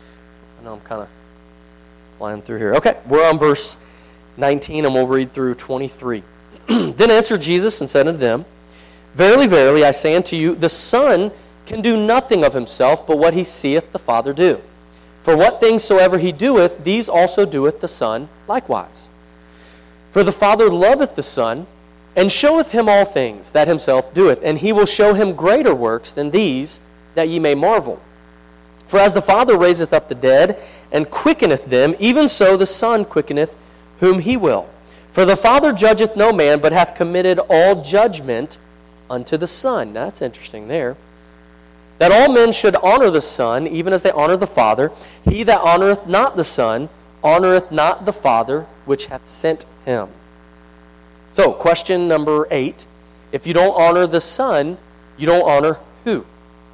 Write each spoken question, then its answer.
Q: If you don't honor the Son, you don't honor who?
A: The Father.